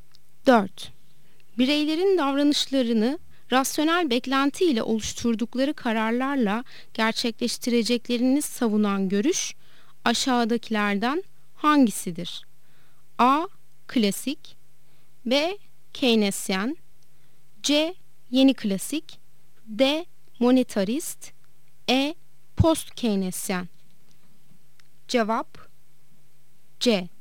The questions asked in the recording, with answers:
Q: Bireylerin davranışlarını rasyonel beklenti ile oluşturdukları kararlarla gerçekleştireceklerini savunan görüş aşağıdakilerden hangisidir?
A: Cevap C. Yeni klasik.